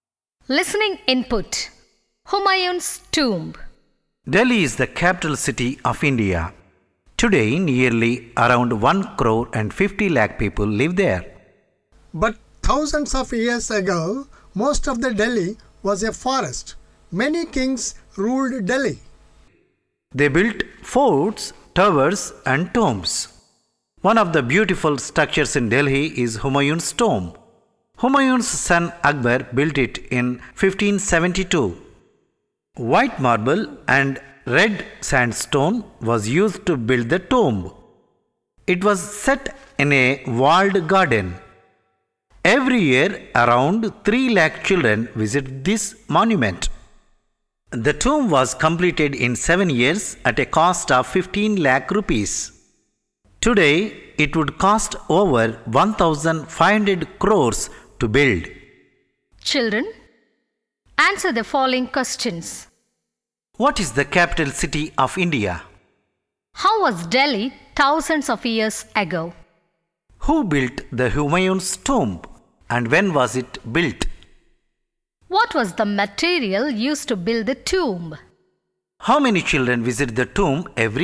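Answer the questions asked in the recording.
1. Delhi
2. Most of it was a forest
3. Akbar, Humayun's son
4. In 1572
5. White marble and red sandstone
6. Around 3 lakh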